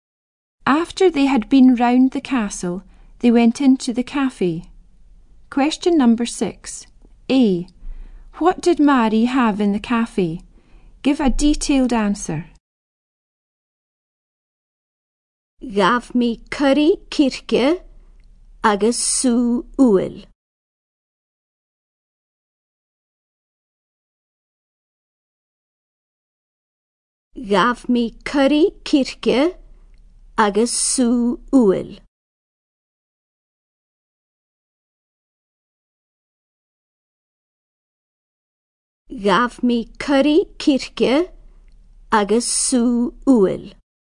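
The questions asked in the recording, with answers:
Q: A. What did Mari have in the cafe?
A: Chicken curry and apple juice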